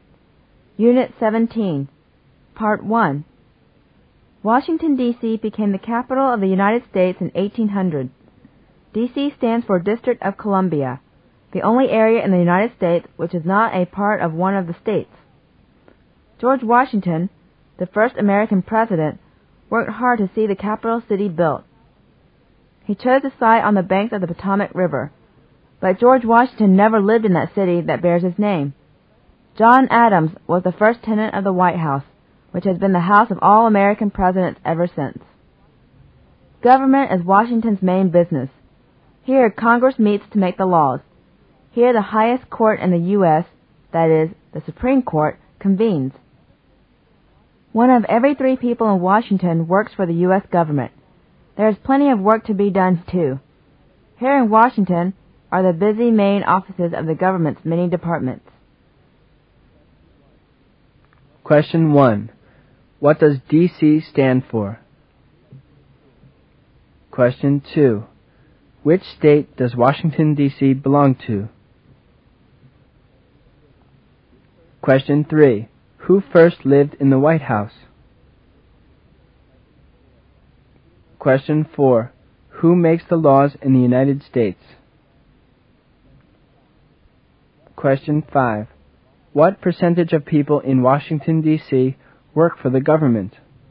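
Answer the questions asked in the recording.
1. District of Columbia
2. None; it is not part of any state
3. John Adams
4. Congress
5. About one third (one in every three)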